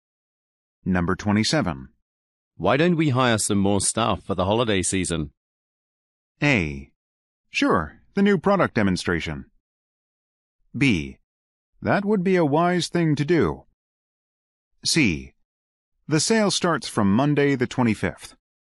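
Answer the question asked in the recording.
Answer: B: That would be a wise thing to do.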